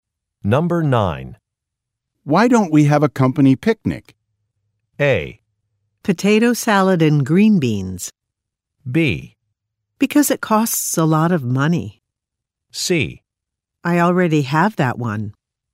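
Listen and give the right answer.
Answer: B: Because it costs a lot of money.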